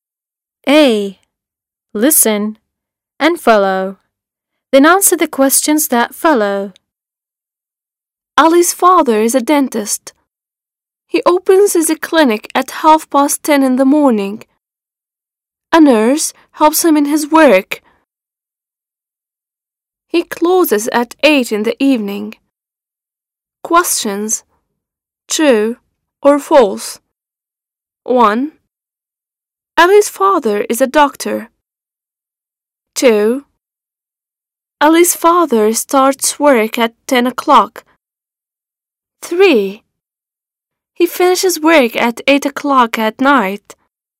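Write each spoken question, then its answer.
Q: Ali's father is a doctor.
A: False

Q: Ali's father starts work at 10 o'clock.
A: False

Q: He finishes work at 8 o'clock at night.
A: True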